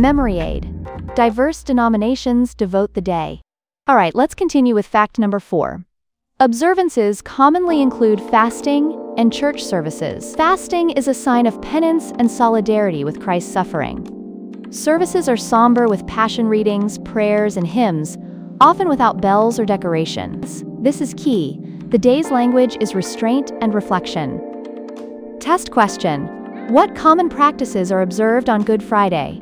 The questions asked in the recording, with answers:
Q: What common practices are observed on Good Friday?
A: Fasting and church services.